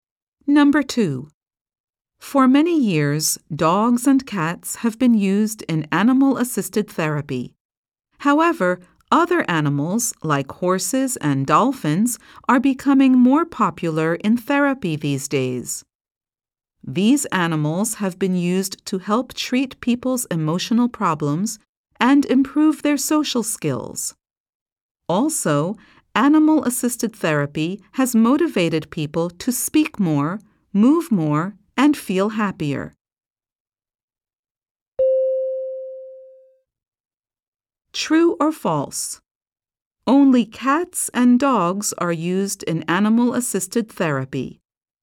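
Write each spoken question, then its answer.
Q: True or false? Only cats and dogs are used in animal-assisted therapy.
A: False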